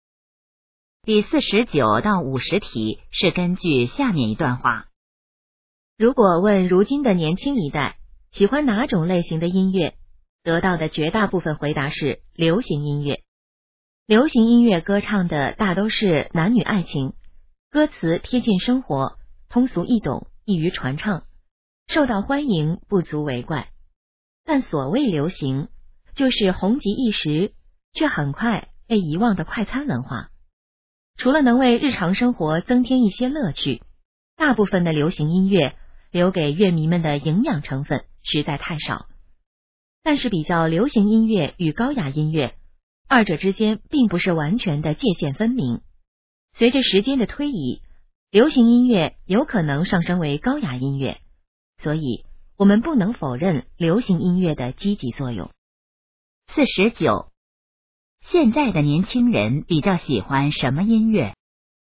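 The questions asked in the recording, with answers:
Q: 现在的年轻人比较喜欢什么音乐?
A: 流行音乐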